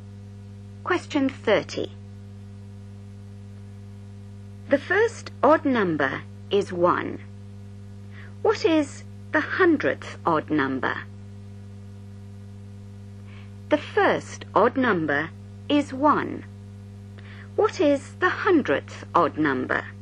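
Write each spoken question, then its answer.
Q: What is the hundredth odd number?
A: 199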